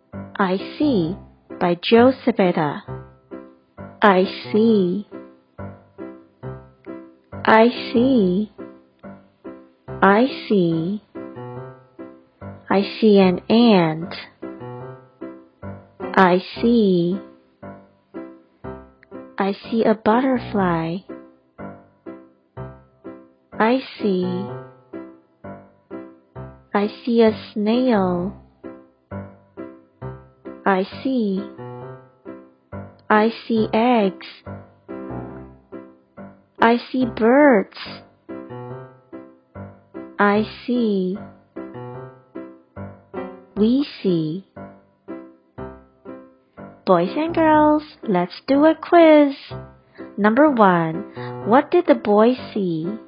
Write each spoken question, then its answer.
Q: what did the boy see?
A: The answer is an ant, a butterfly, and a snail.